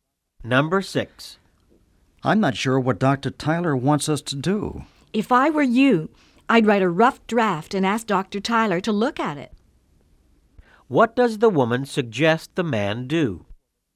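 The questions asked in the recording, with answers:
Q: What does the woman suggest the man do?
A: Write a rough draft and ask Dr. Tyler to look at it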